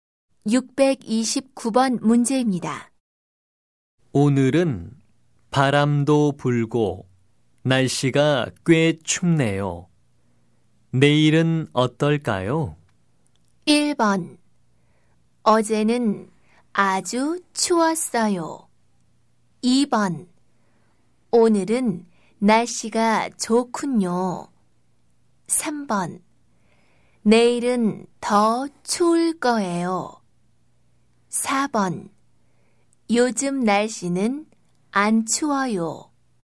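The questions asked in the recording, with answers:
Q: 내일은 어떨까요?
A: 3: 내일은 더 추울 거예요.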